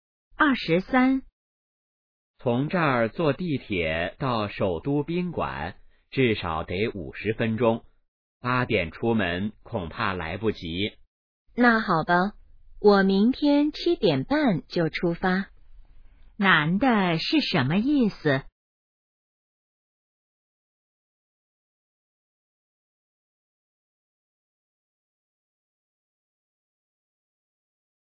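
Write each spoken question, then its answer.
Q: 男的是什么意思?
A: 明天7点半出发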